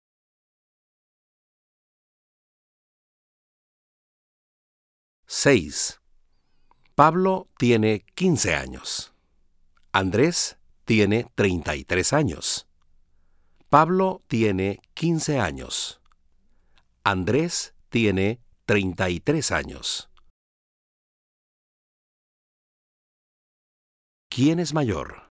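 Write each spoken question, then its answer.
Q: ¿Quién es mayor?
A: Andrés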